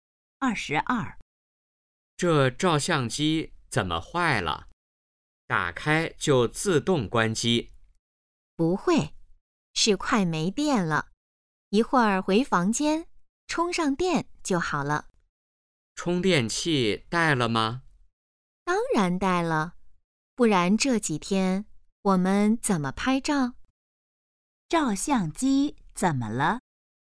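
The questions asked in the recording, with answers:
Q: 照相机怎么了?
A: 快没电了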